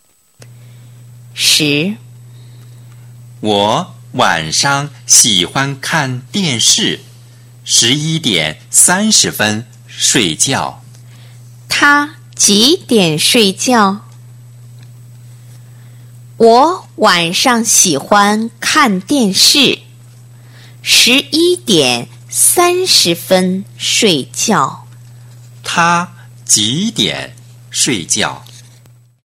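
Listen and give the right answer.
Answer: 11:30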